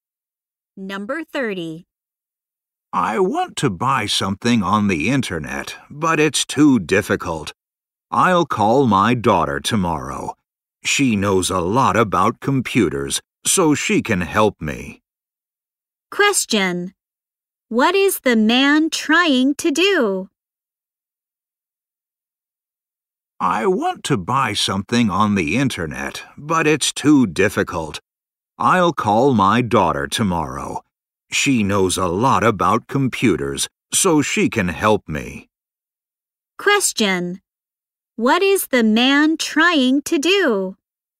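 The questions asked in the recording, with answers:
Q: Question. What is the man trying to do?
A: Buy something on the internet.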